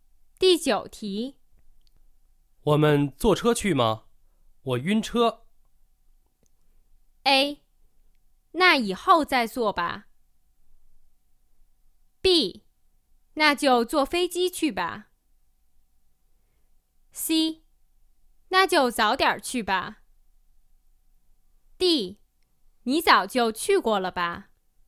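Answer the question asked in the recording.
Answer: B: 那就坐飞机去吧。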